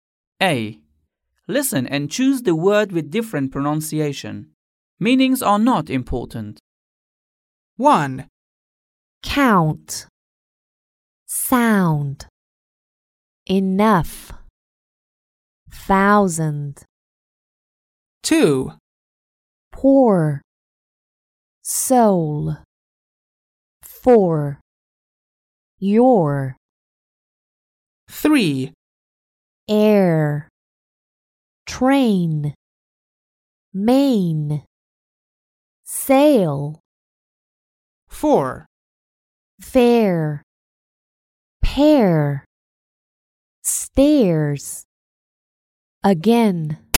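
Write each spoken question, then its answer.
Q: Count. Sound. Enough. Thousand.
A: Enough

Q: Air. Train. Main. Sail.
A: Air

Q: Fair. Pair. Stairs. Again.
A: Again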